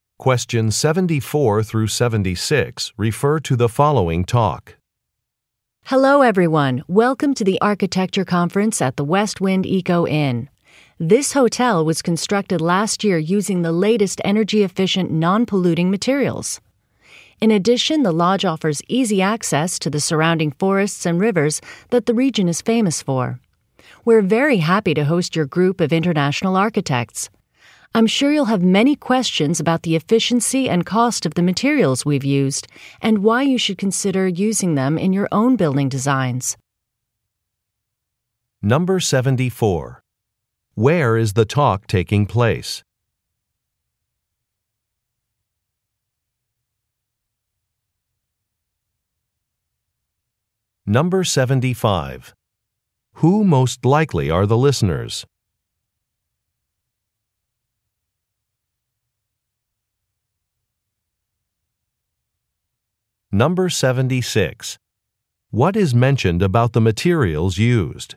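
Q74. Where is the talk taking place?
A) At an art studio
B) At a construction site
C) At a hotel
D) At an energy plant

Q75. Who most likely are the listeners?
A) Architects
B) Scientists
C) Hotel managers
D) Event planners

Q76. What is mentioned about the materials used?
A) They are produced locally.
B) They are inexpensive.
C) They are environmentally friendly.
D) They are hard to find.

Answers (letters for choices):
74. C
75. A
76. C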